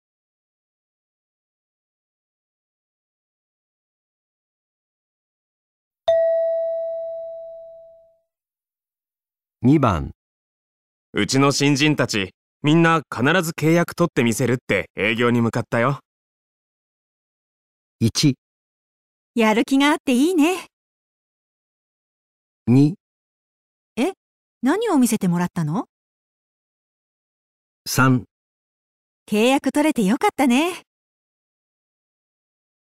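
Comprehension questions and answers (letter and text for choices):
うちの新人たち、みんな必ず契約取ってみせるって、 営業に向かったよ。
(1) やる気があっていいね。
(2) え?何を見せてもらったの?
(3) 契約取れてよかったね。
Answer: (1) やる気があっていいね。

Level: 【N1 第1回】聴解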